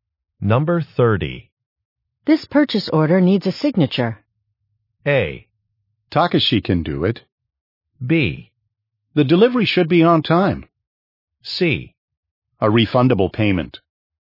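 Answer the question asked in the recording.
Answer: A: Takashi can do it.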